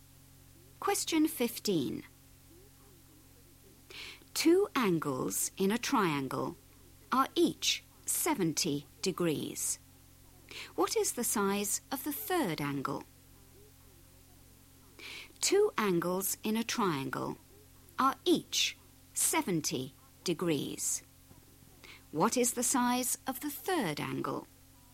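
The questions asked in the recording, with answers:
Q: What is the size of the third angle?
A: 40 degrees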